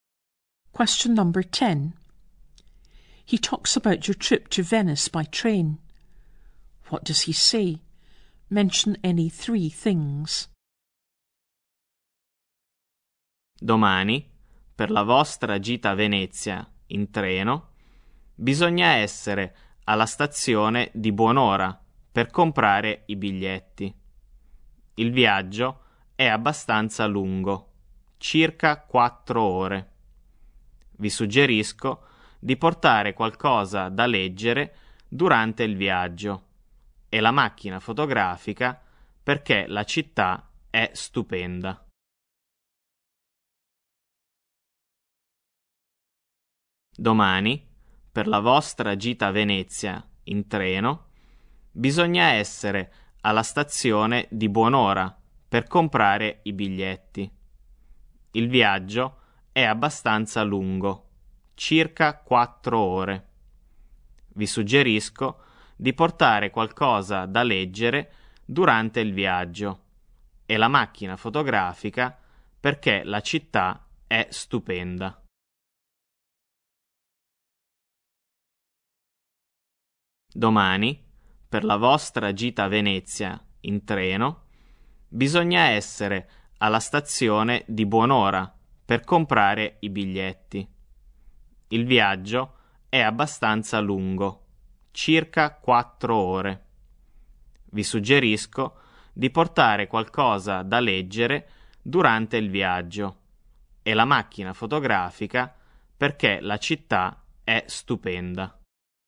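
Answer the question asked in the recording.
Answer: Be at the station early to buy tickets; the journey is about 4 hours; bring something to read and a camera because the city is beautiful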